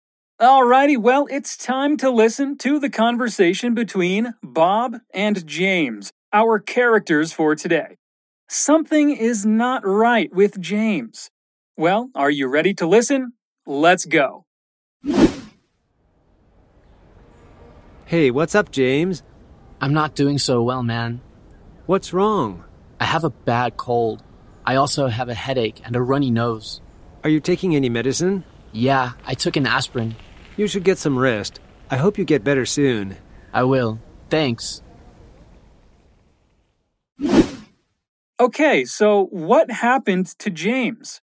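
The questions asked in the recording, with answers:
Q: Okay, so what happened to James?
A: He has a bad cold, with a headache and a runny nose.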